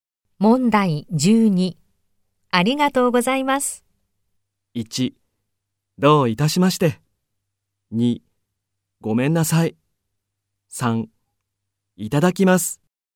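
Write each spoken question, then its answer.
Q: ありがとうございます。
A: 3: どういたしまして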